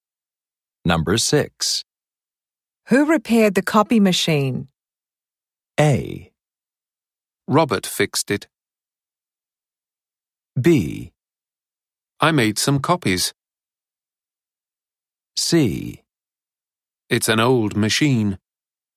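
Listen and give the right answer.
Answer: A: Robert fixed it.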